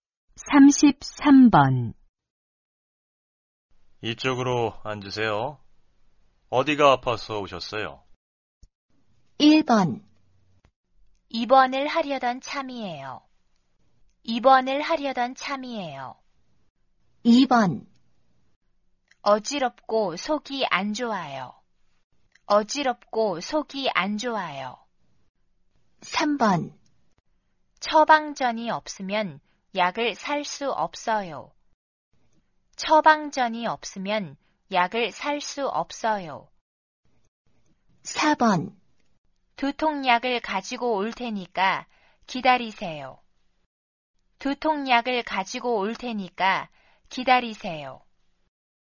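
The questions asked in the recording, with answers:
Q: 이쪽으로 앉으세요. 어디가 아파서 오셨어요?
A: 2: 어지럽고 속이 안 좋아요.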